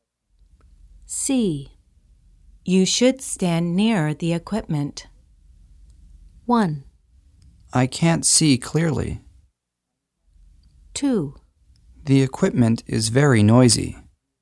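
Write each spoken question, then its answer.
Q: You should stand near the equipment.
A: 1: I can't see clearly.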